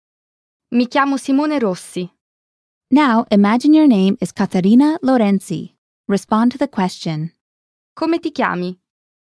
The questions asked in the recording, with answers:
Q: Come ti chiami?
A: Mi chiamo Caterina Lorenzi.